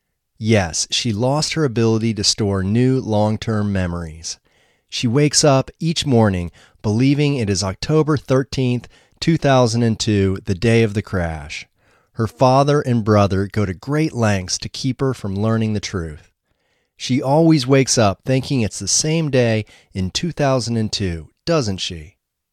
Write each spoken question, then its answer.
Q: She always wakes up thinking it's the same day in 2002, doesn't she?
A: Yes, she always wakes up thinking it's the same day in 2002.